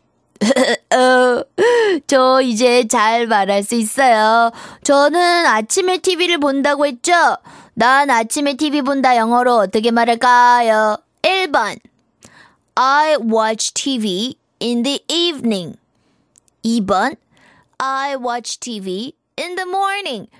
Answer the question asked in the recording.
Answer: 그래서 2번에 I watch TV in the morning.